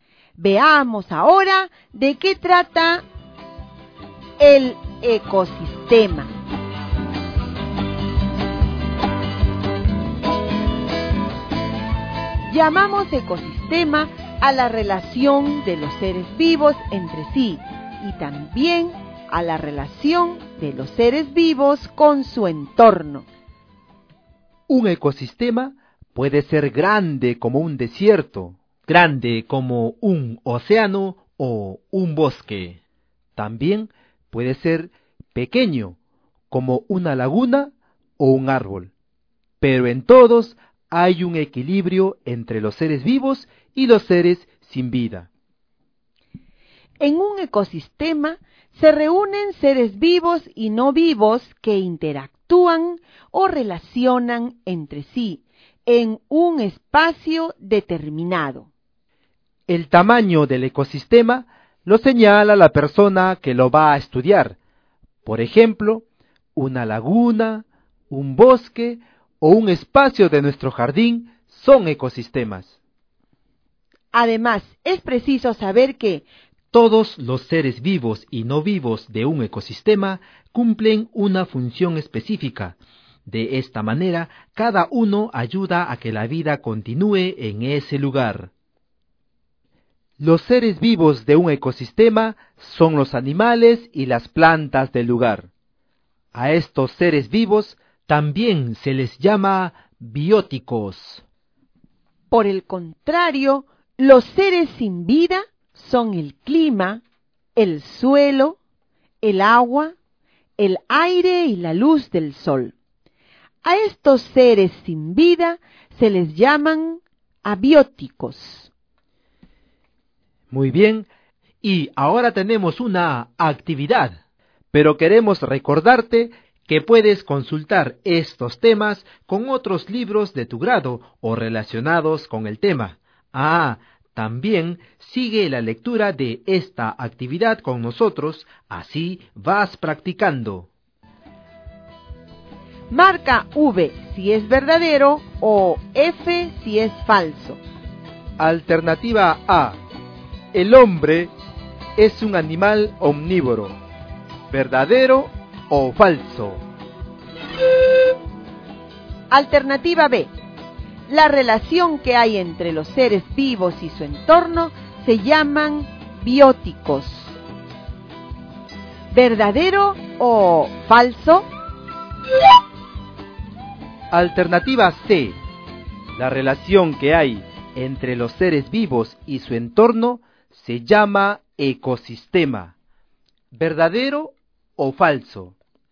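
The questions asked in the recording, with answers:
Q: La relación que hay entre los seres vivos y su entorno se llaman bióticos. ¿Verdadero o falso?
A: Falso

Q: La relación que hay entre los seres vivos y su entorno se llama ecosistema. ¿Verdadero o falso?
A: Verdadero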